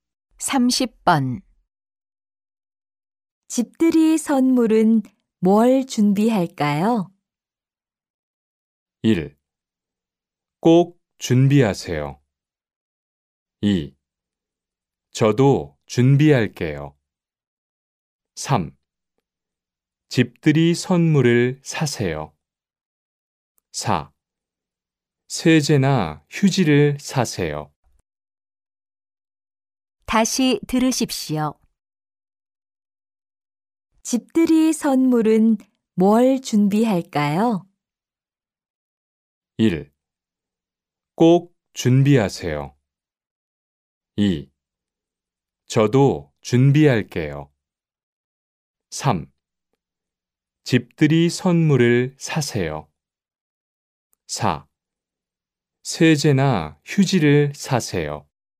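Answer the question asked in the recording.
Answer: 4: 세제나 휴지를 사세요.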